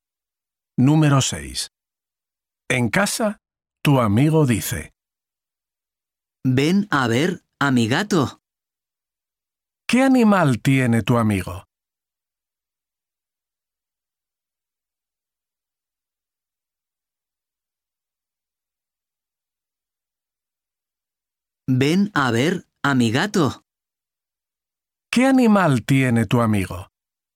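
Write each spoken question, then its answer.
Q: ¿Qué animal tiene tu amigo?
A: un gato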